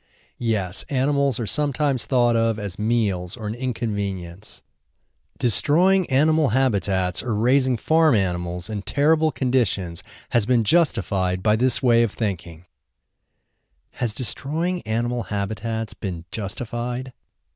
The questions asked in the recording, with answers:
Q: Has destroying animal habitats been justified?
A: Yes, destroying animal habitats has been justified by this way of thinking.